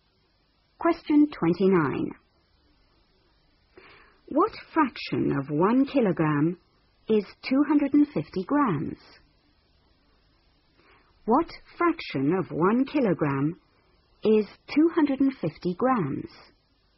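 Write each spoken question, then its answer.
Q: What fraction of 1 kilogram is 250 grams?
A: 1/4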